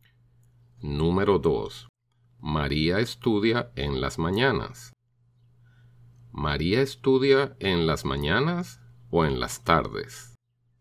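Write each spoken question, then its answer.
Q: ¿María estudia en las mañanas o en las tardes?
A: María estudia en las mañanas.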